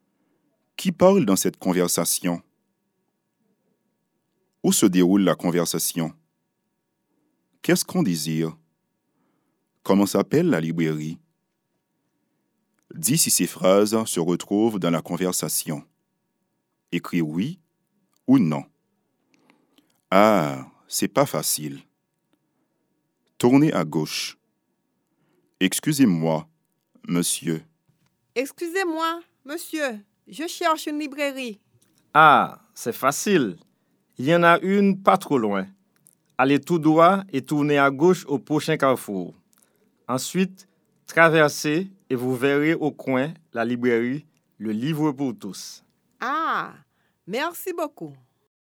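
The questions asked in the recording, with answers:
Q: Qu'est-ce qu'on désire?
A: Trouver une librairie

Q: Comment s'appelle la librairie?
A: Le Livre pour tous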